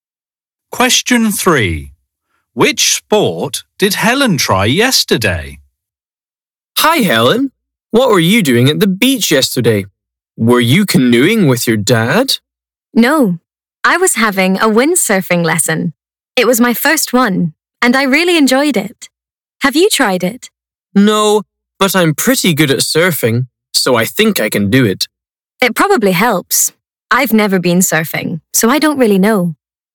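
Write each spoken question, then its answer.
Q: Which sport did Helen try yesterday?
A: windsurfing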